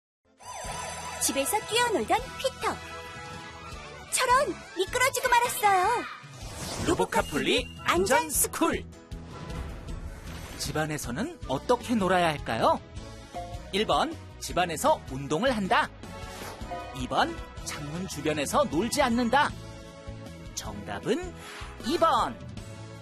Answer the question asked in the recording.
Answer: 정답은 2번.